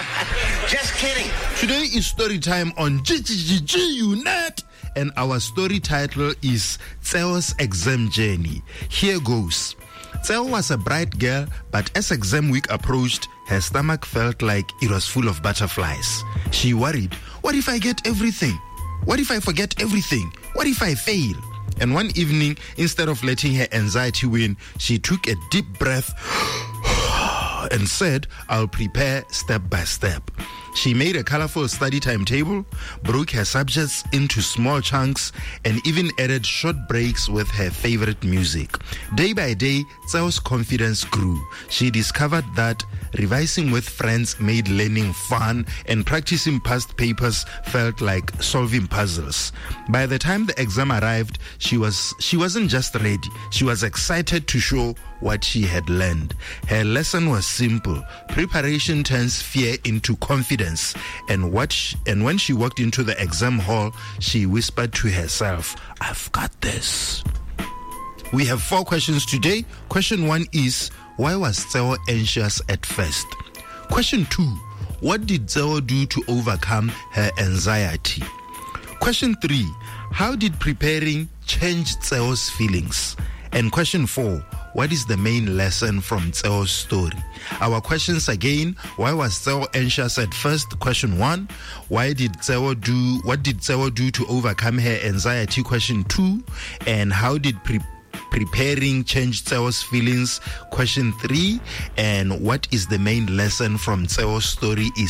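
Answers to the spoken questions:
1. Exam week was approaching and she worried she would forget everything or fail
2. She prepared step by step: made a study timetable, broke subjects into small chunks, took breaks, revised with friends and practised past papers
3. Her confidence grew and she became excited instead of afraid
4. Preparation turns fear into confidence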